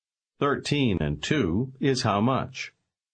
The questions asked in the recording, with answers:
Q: Thirteen and two is how much?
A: Fifteen.